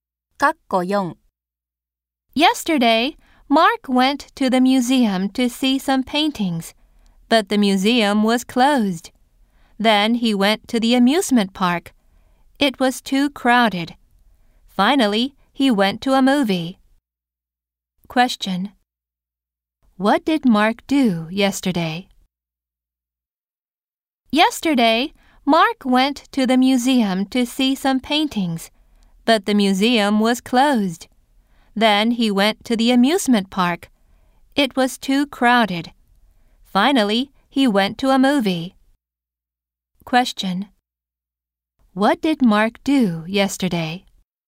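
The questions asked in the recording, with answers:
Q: What did Mark do yesterday?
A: He went to a movie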